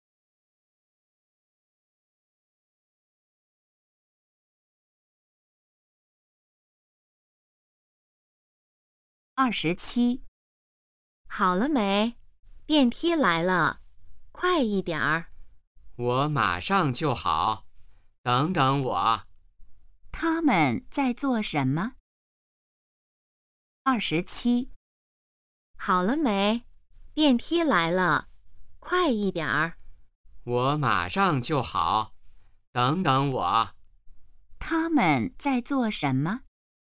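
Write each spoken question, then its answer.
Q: 他们在做什么?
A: 等电梯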